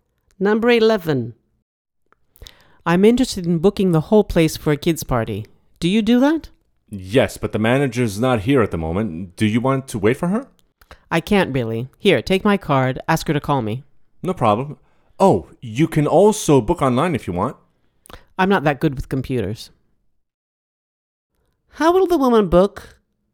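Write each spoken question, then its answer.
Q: How will the woman book?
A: By phone, when the manager calls her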